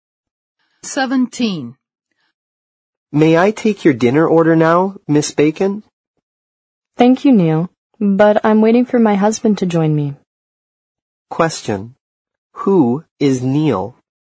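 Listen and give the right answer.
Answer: A waiter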